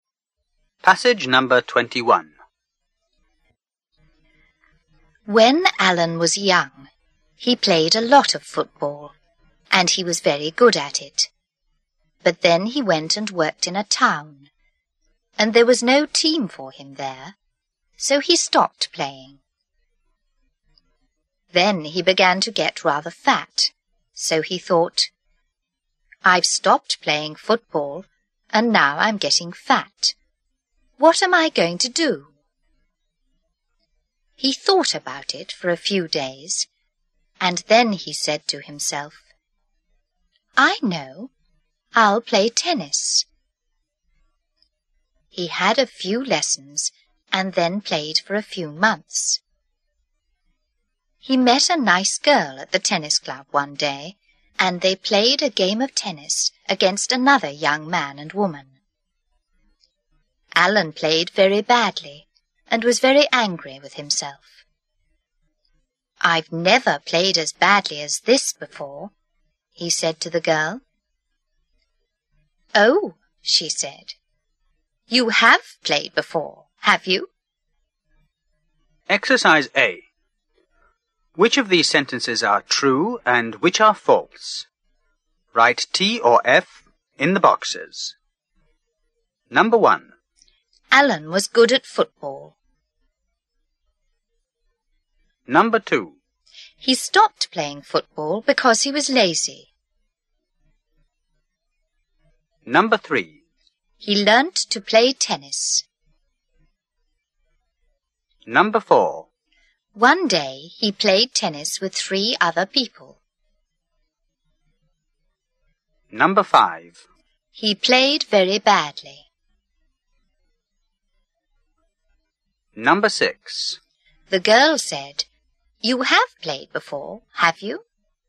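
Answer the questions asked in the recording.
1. True
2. False
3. True
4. True
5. True
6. True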